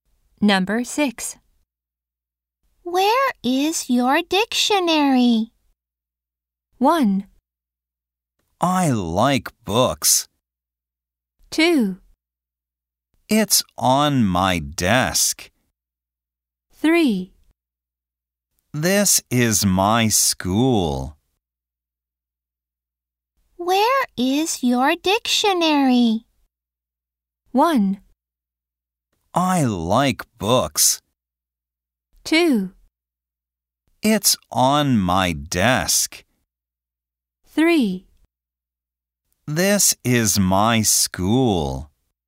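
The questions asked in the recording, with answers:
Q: Where is your dictionary?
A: 2: It's on my desk.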